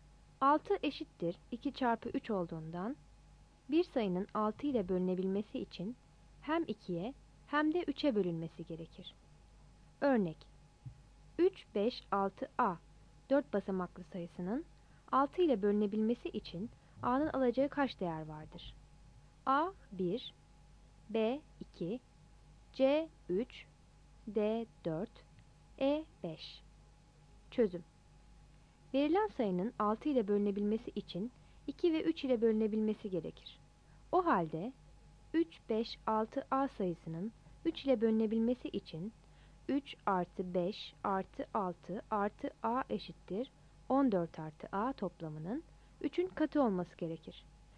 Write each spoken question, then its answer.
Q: Örnek: 3, 5, 6, A 4 basamaklı sayısının 6 ile bölünebilmesi için A'nın alacağı kaç değer vardır?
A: Yanıt a'dır.